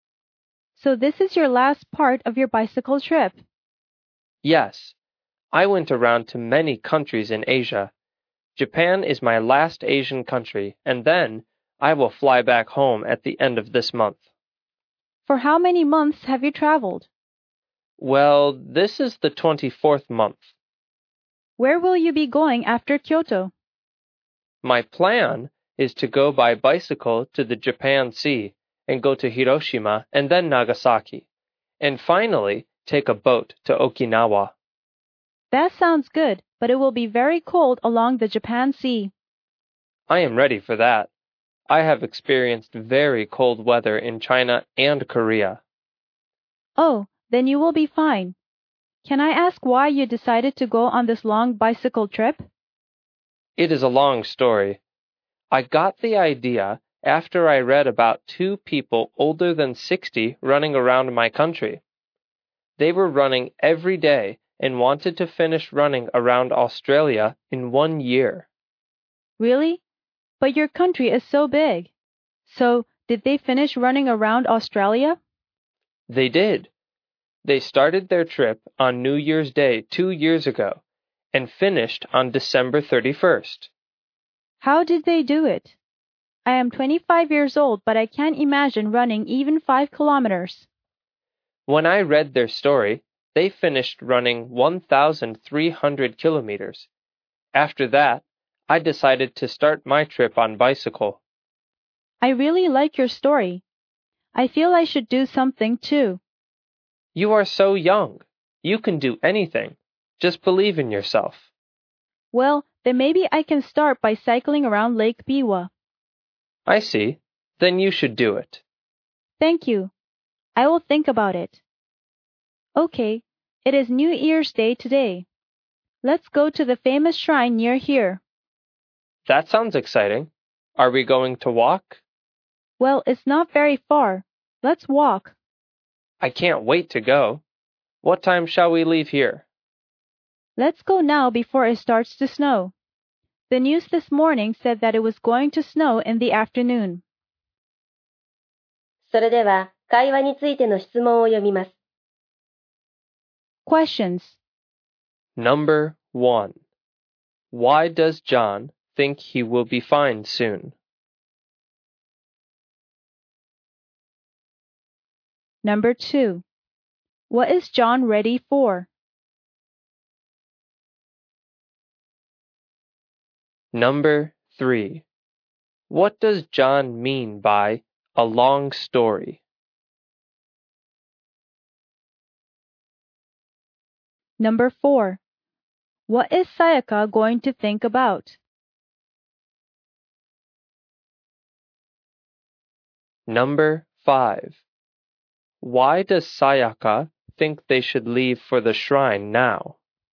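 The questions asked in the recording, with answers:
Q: What is John ready for?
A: The very cold weather along the Japan Sea

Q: What is Sayaka going to think about?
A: Cycling around Lake Biwa

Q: Why does Sayaka think they should leave for the shrine now?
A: Because the news said it would snow in the afternoon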